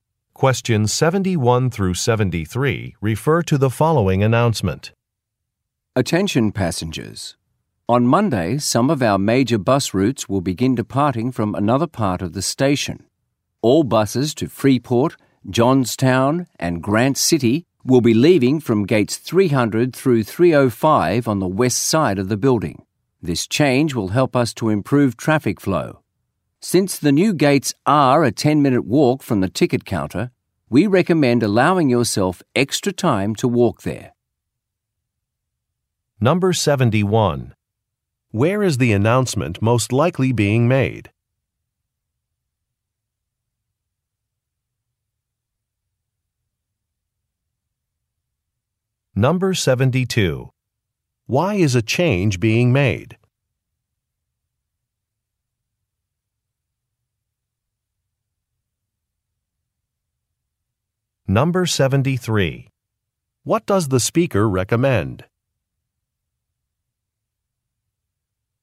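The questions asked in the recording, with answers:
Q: Where is the announcement most likely being made?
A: At a bus station

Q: Why is a change being made?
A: To improve traffic flow

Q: What does the speaker recommend?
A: Allowing extra time to walk to the new gates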